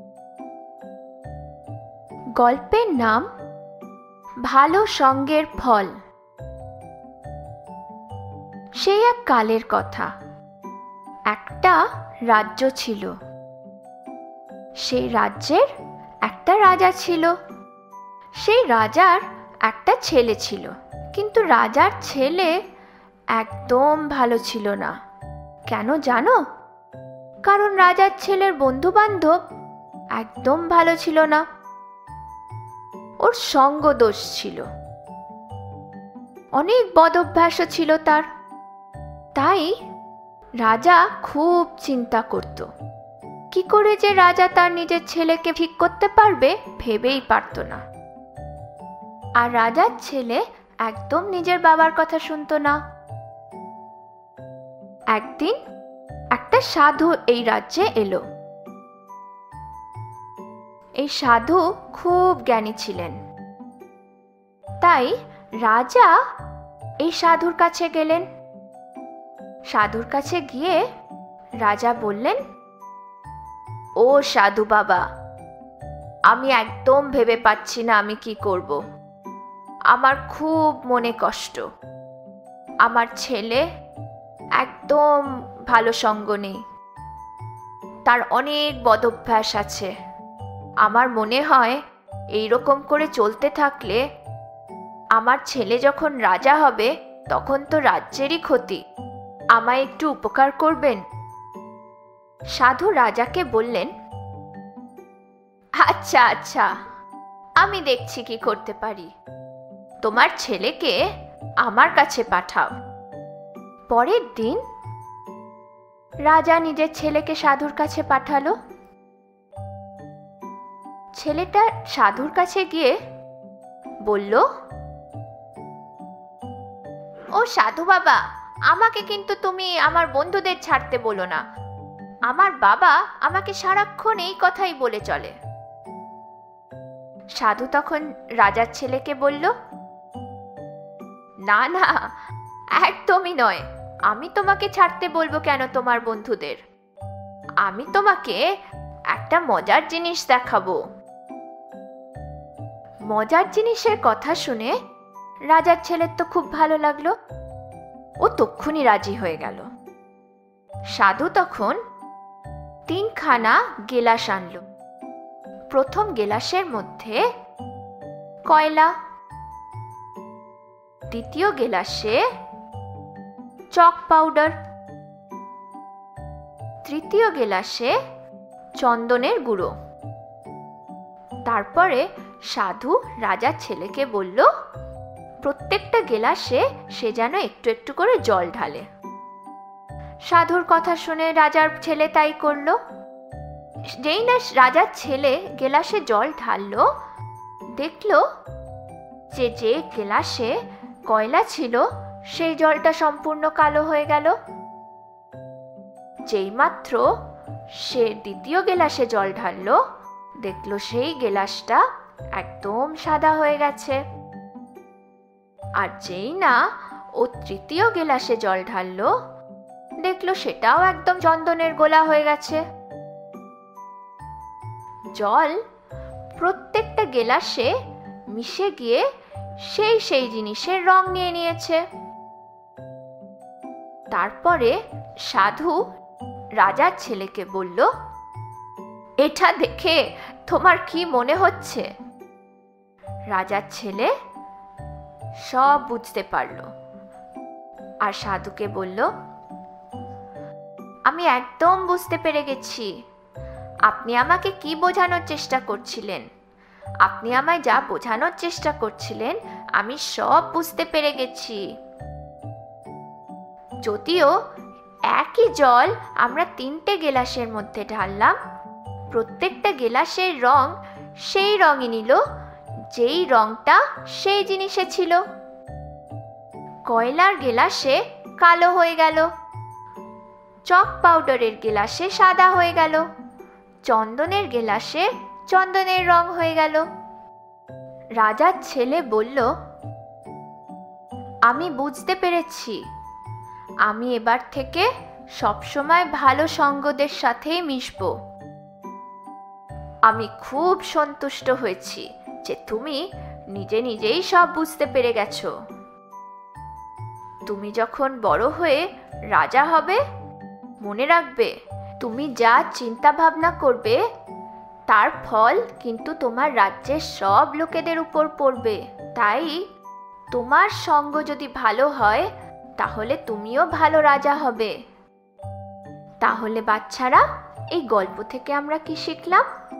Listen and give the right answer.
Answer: নিজেদের সঙ্গের খেয়াল রাখবে, ভালো সঙ্গের ফল ভালো হয়।